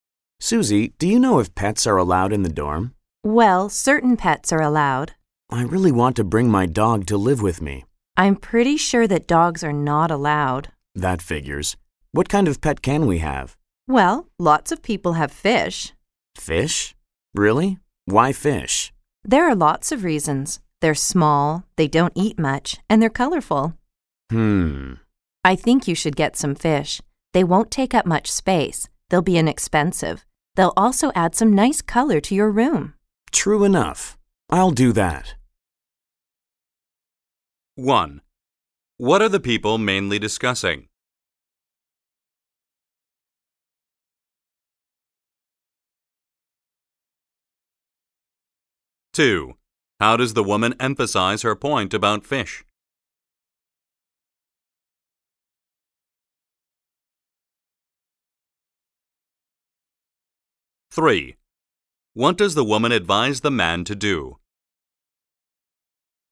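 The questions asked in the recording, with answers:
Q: What are the people mainly discussing?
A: Which pets are allowed in the dorm

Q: What does the woman advise the man to do?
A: Get some fish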